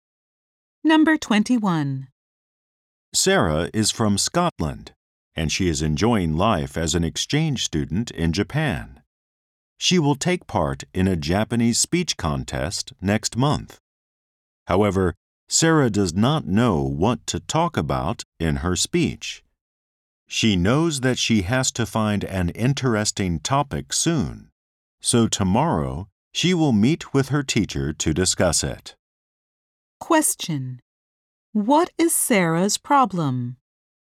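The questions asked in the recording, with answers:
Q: What is Sarah's problem?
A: She does not know what to talk about in her speech.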